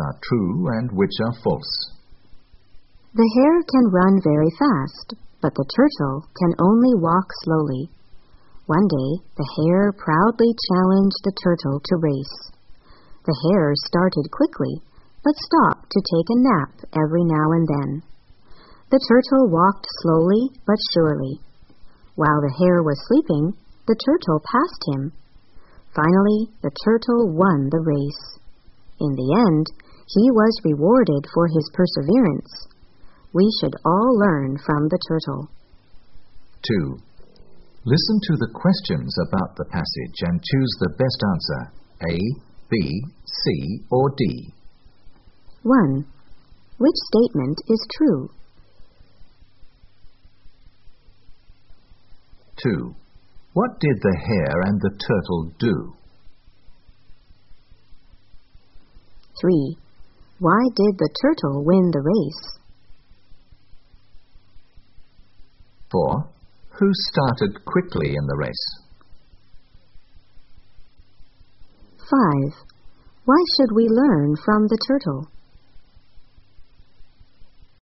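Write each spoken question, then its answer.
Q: What did the hare and the turtle do?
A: They had a race.

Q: Why did the turtle win the race?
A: The hare stopped to nap, and the turtle kept going slowly but surely.

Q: Who started quickly in the race?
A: The hare

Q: Why should we learn from the turtle?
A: Because of his perseverance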